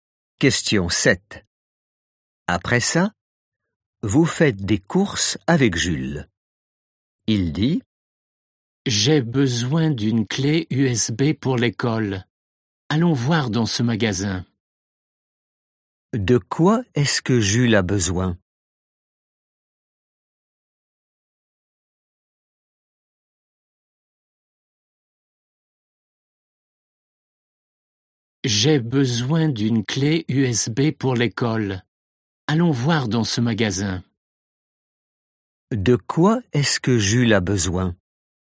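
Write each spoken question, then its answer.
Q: De quoi est-ce que Jules a besoin?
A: d'une clé USB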